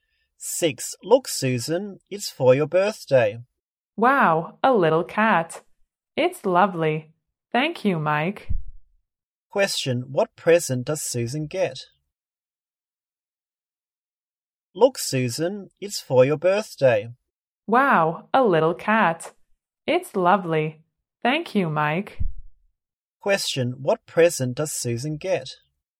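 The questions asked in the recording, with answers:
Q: Question, what present does Susan get?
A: A little cat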